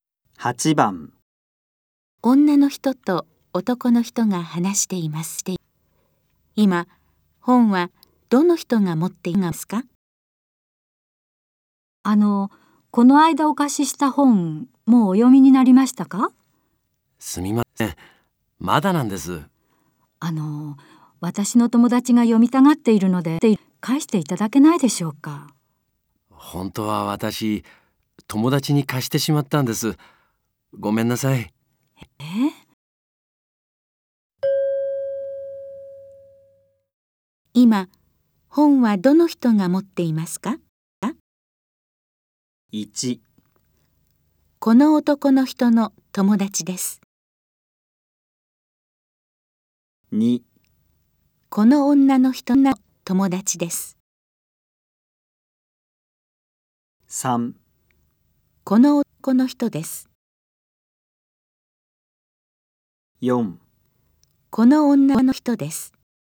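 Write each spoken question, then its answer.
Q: 今本はどの人が持っていますか?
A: 1: この男の人の友達です。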